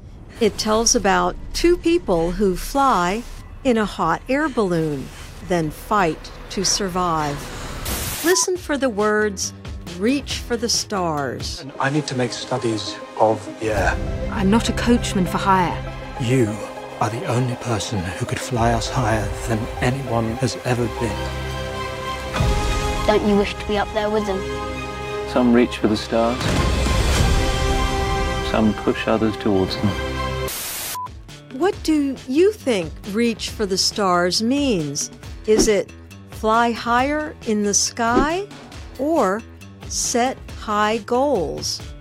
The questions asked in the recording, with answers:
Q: What do you think reach for the stars means?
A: The answer is B, set high goals.